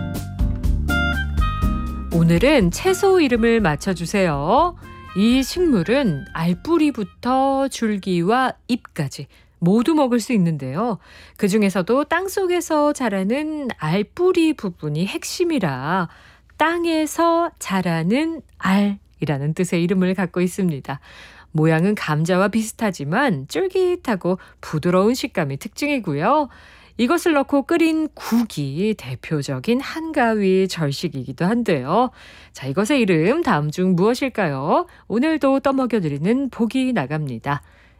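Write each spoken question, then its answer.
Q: 자, 이것의 이름 다음 중 무엇일까요?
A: 토란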